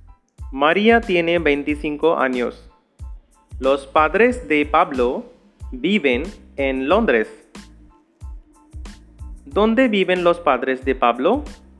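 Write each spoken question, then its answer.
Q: ¿Dónde viven los padres de Pablo?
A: En Londres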